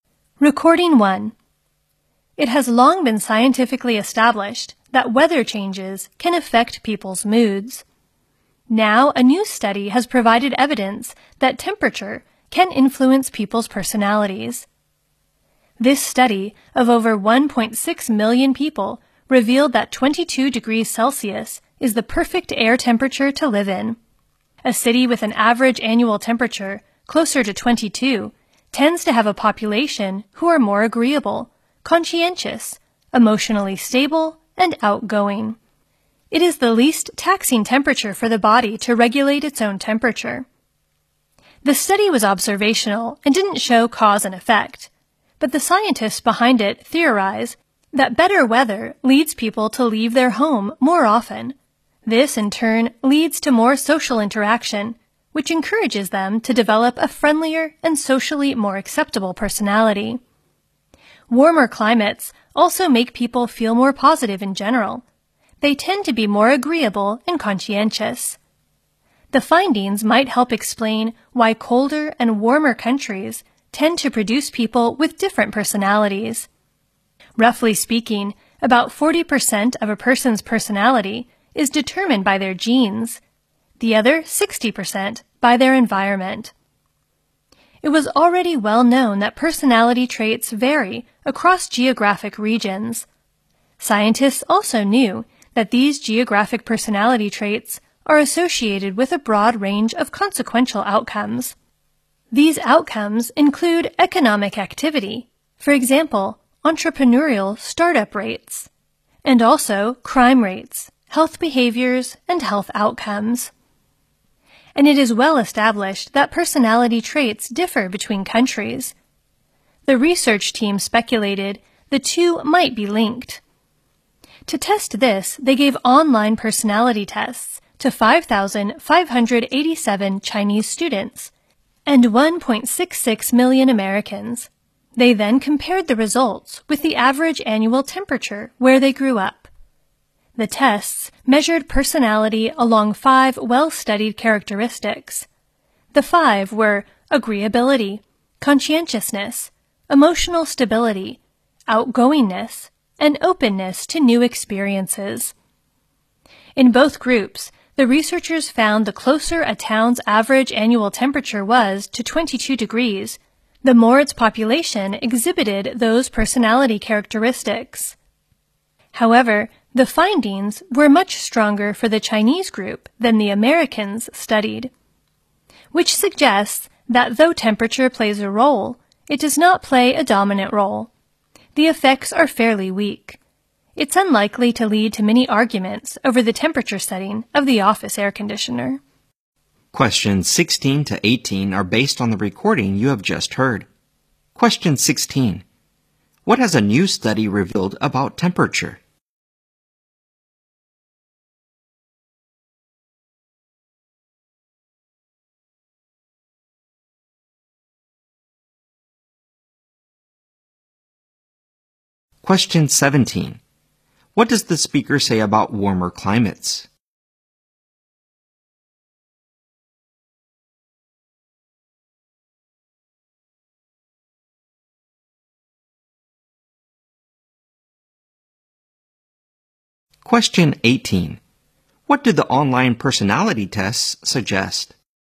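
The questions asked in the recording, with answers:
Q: What has a new study revealed about temperature?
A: It can influence people's personalities; 22°C is the ideal

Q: What does the speaker say about warmer climates?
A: They make people feel more positive in general

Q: What do the online personality tests suggest?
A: Temperature plays a role but not a dominant one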